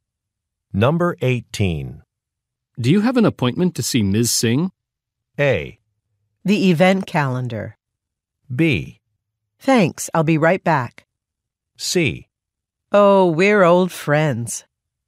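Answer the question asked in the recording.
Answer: C: Oh, we're old friends.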